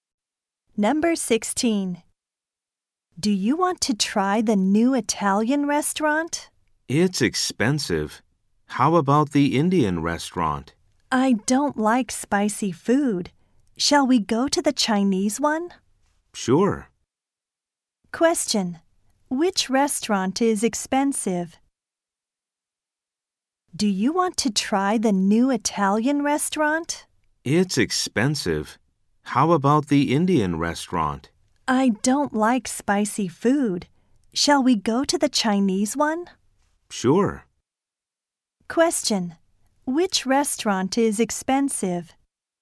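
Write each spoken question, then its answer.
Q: Which restaurant is expensive?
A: The new Italian restaurant.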